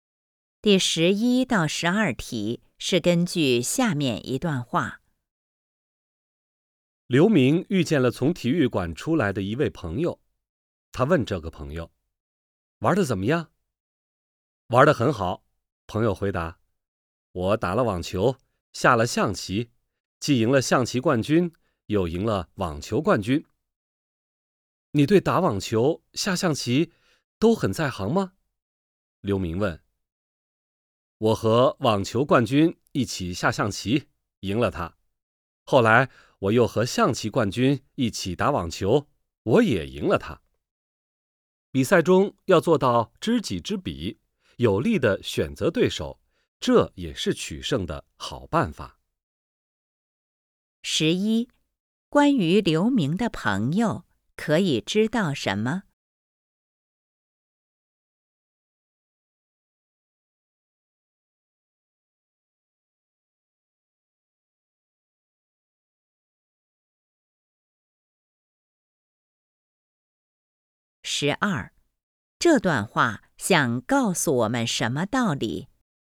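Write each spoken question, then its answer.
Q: 关于刘明的朋友,可以知道什么?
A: 他和网球冠军下象棋、和象棋冠军打网球,两次都赢了

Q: 这段话想告诉我们什么道理?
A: 要知己知彼,选择对自己有利的对手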